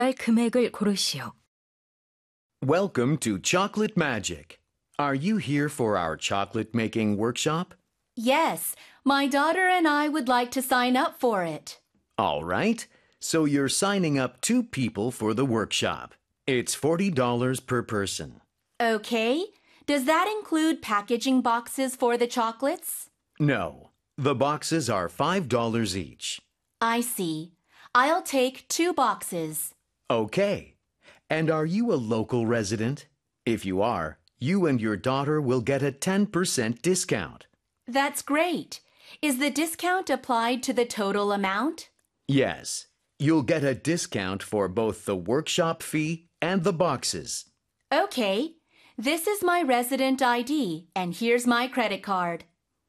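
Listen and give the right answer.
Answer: $81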